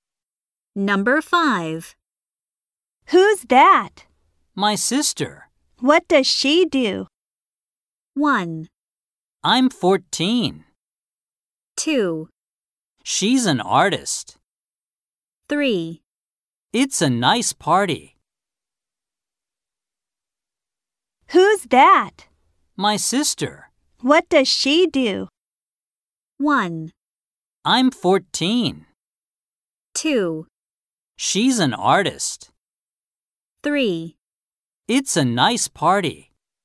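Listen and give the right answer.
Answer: 2: She's an artist.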